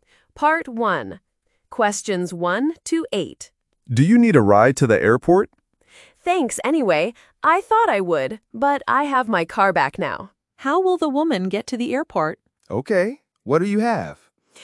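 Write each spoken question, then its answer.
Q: How will the woman get to the airport?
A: She will drive her own car.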